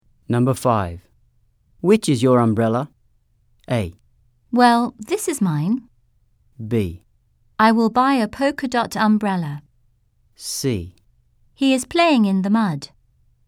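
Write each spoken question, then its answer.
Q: Which is your umbrella?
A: A: Well, this is mine.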